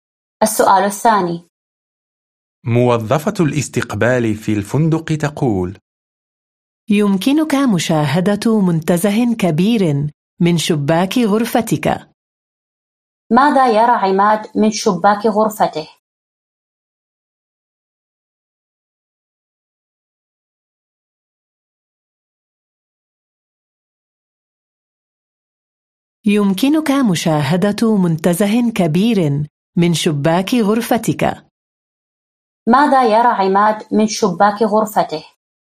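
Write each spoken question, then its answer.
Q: ماذا يرى عماد من شباك غرفته؟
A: منتزه كبير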